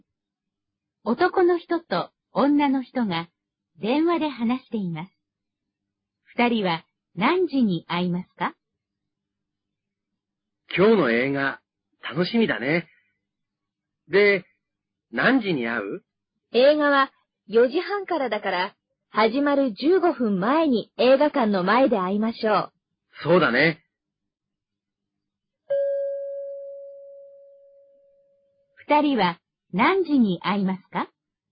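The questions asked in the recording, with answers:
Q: 二人は何時に会いますか?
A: 4時15分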